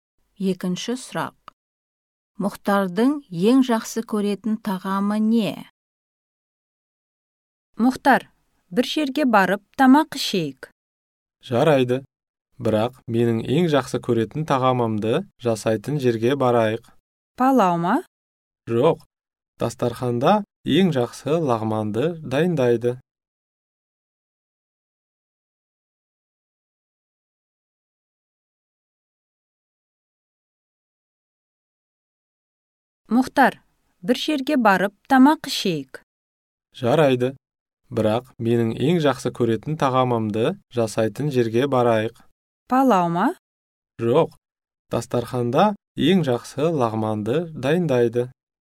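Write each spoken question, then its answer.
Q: Мұхтардың ең жақсы көретін тағамы не?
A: Лағман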